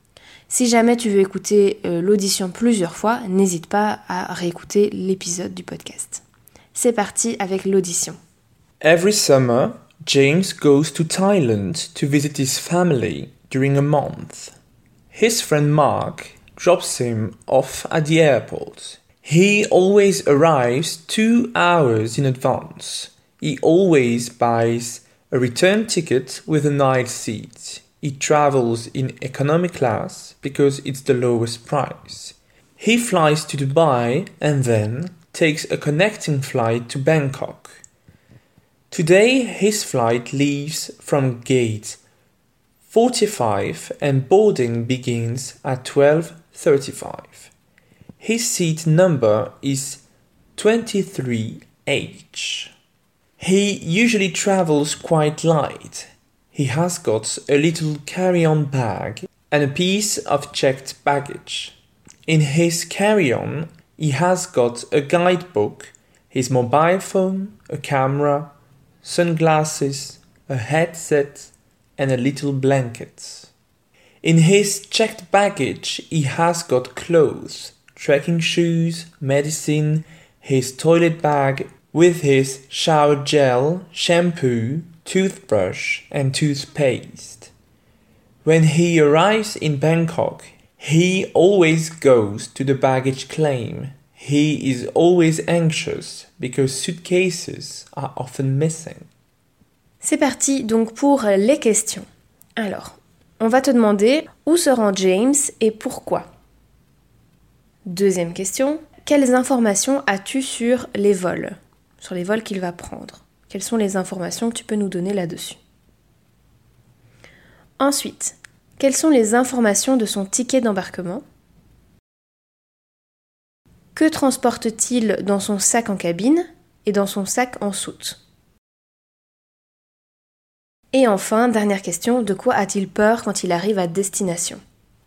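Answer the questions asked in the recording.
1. En Thaïlande, pour rendre visite à sa famille pendant un mois
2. Billet aller-retour en classe économique, vol vers Dubaï puis correspondance pour Bangkok
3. Porte 45, embarquement à 12h35, siège 23H
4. Cabine : guide, téléphone portable, appareil photo, lunettes de soleil, casque audio, petite couverture ; soute : vêtements, chaussures de randonnée, médicaments, trousse de toilette (gel douche, shampoing, brosse à dents, dentifrice)
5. Que ses valises soient perdues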